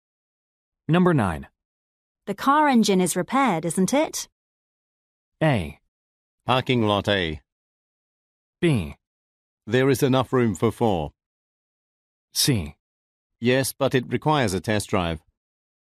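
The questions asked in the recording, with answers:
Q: The car engine is repaired, isn't it?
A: C: Yes, but it requires a test drive.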